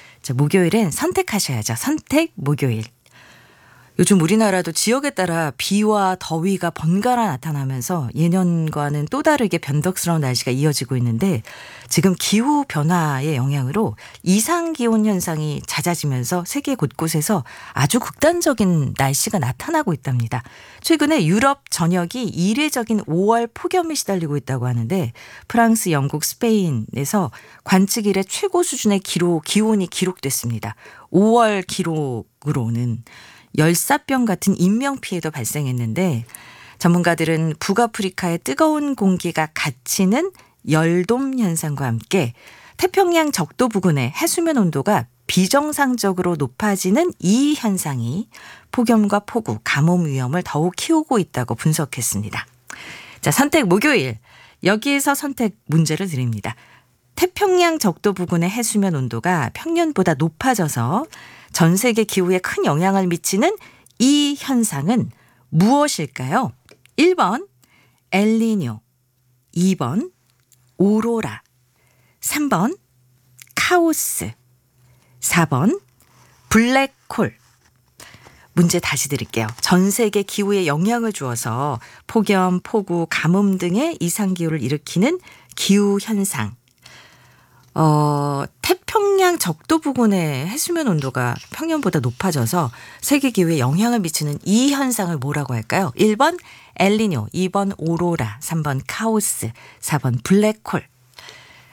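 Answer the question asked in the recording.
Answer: 1: 엘니뇨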